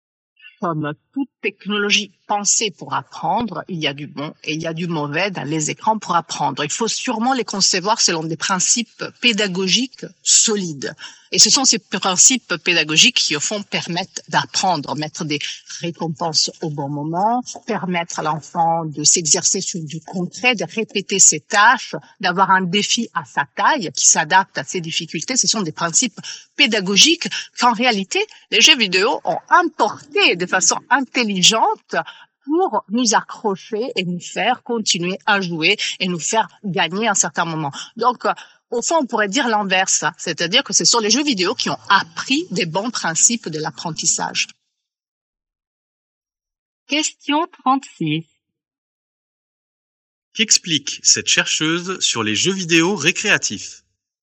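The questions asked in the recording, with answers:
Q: Qu'explique cette chercheuse sur les jeux vidéo récréatifs ?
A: Ils ont repris de bons principes pédagogiques de l'apprentissage pour nous accrocher et nous faire continuer à jouer.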